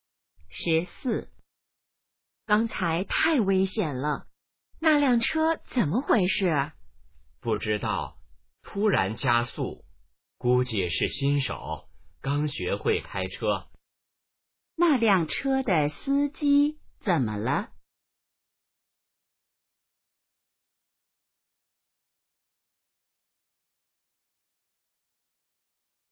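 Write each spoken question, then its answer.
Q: 那辆车的司机怎么了?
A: 可能是新手,刚学会开车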